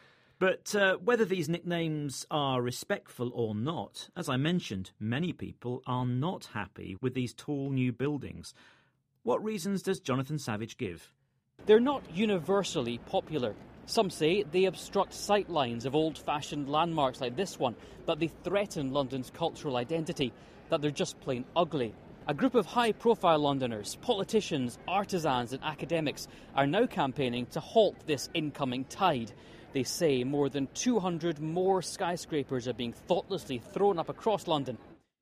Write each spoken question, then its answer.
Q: What reasons does Jonathan Savage give?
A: They said they obstruct sight lines.